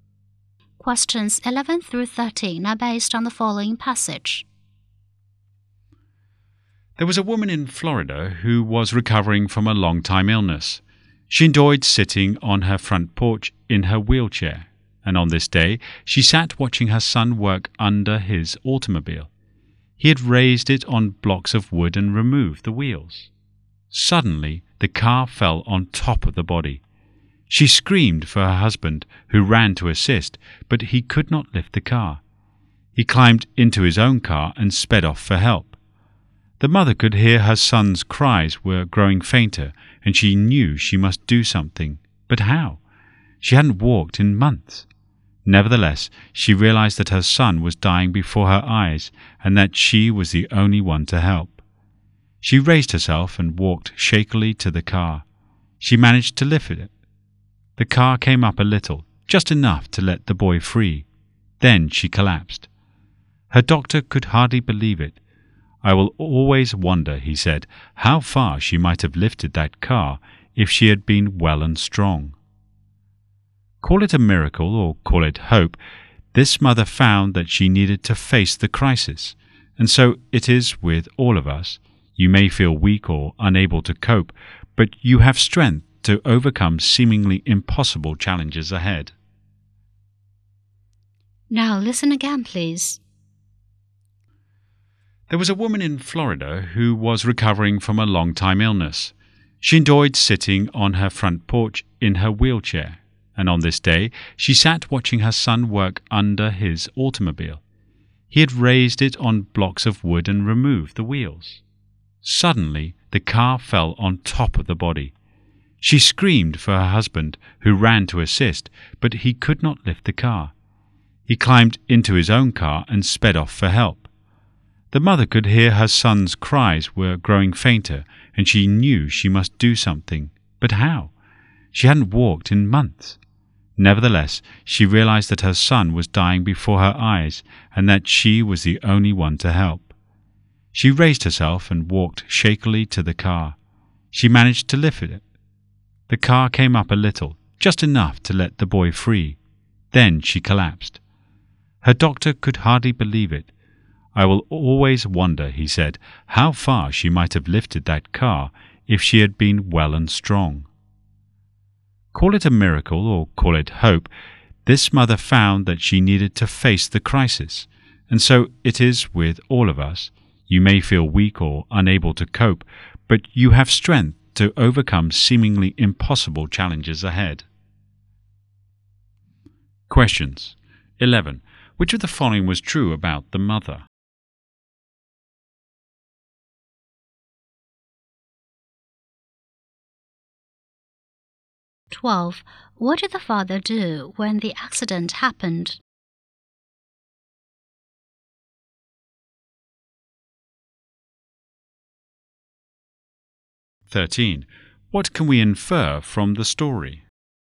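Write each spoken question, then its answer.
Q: What did the father do when the accident happened?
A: He drove off to get help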